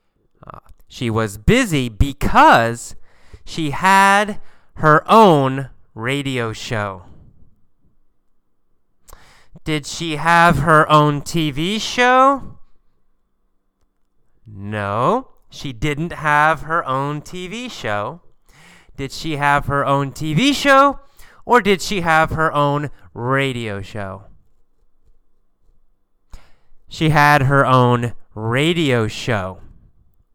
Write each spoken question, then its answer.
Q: Did she have her own TV show or did she have her own radio show?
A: She had her own radio show.